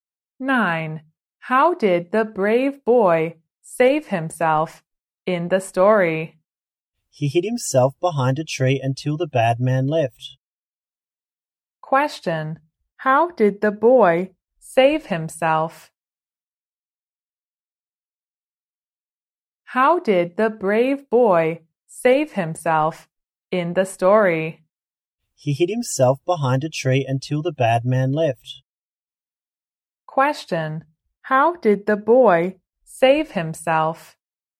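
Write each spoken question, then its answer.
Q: how did the boy save himself?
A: He hid behind a tree until the bad man left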